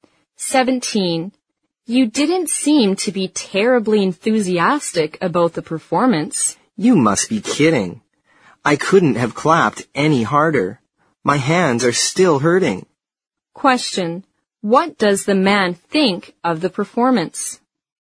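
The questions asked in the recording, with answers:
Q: What does the man think of the performance?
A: He liked it very much.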